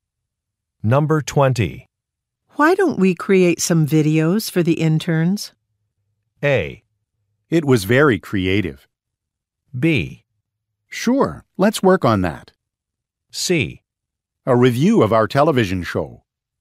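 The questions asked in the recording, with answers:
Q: Why don't we create some videos for the interns?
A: B: Sure, let's work on that.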